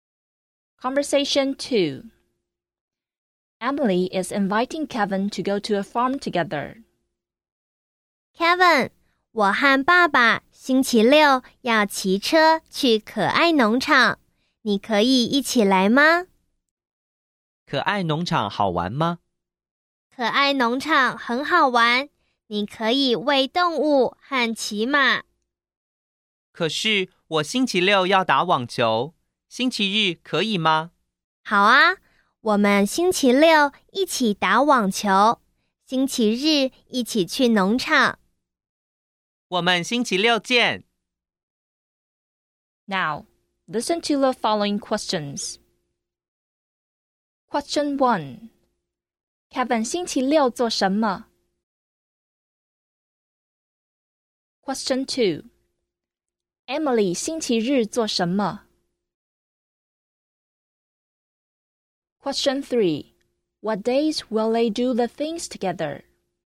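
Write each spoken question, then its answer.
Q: Kevin 星期六做什么?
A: 打网球

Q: Emily 星期日做什么?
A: 去可爱农场

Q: What days will they do the things together?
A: Saturday: play tennis; Sunday: go to the farm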